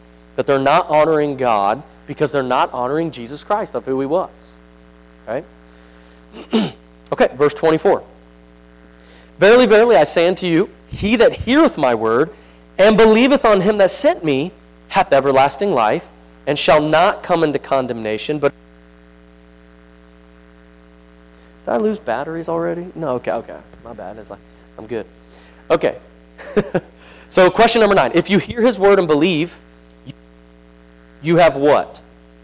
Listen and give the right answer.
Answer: Eternal life.